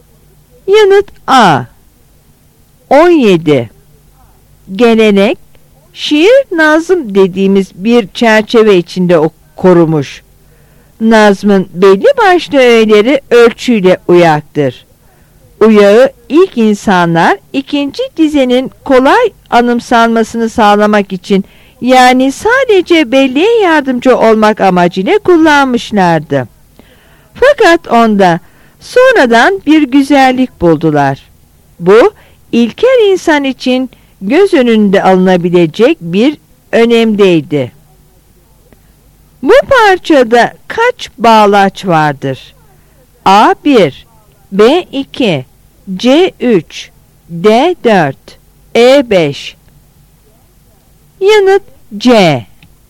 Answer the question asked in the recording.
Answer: Yanıt C.